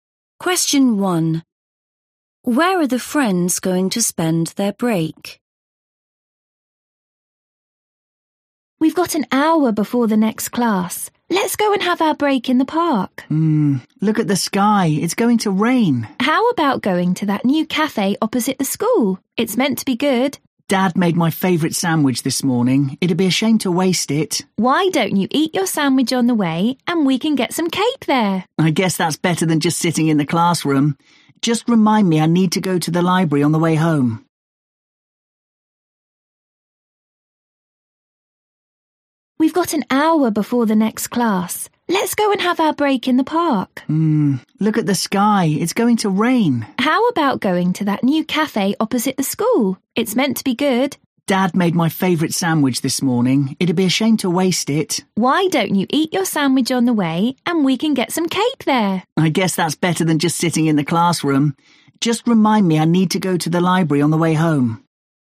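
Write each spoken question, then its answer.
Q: Where are the friends going to spend their break?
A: At the new cafe opposite the school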